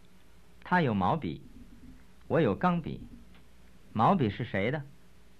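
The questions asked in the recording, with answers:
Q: 毛笔是谁的?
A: 他的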